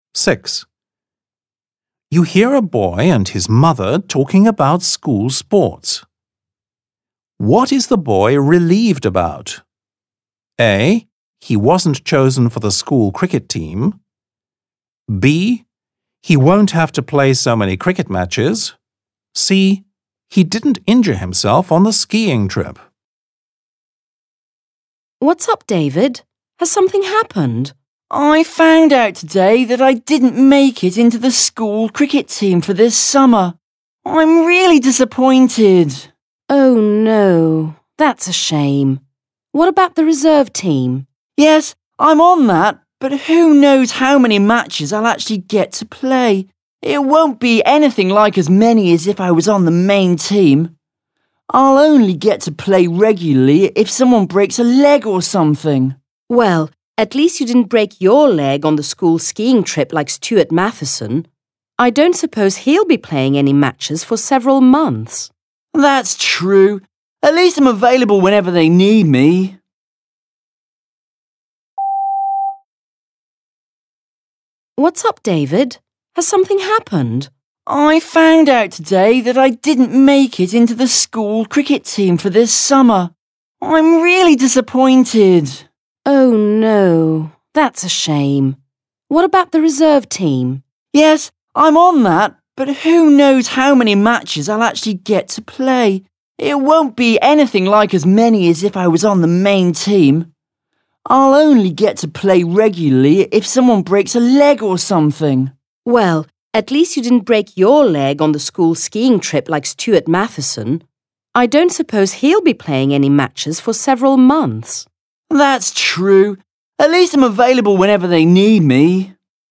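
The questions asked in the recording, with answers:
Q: What is the boy relieved about?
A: C: He didn't injure himself on the skiing trip.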